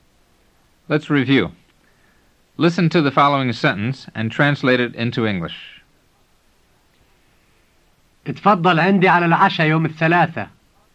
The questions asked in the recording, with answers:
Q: Listen to the following sentence and translate it into English.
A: It means, please come over to my place for dinner on Tuesday.